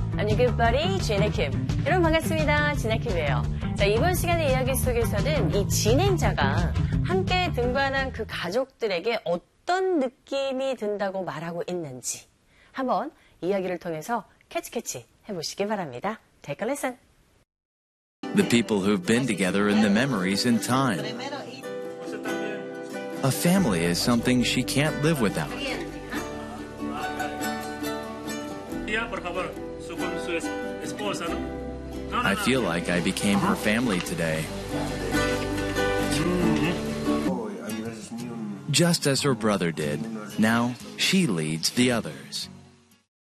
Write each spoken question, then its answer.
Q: 이 진행자가 함께 등반한 그 가족들에게 어떤 느낌이 든다고 말하고 있는지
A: 진행자가 오늘 그 가족의 한 사람이 된 것 같은 느낌이 든 모양입니다.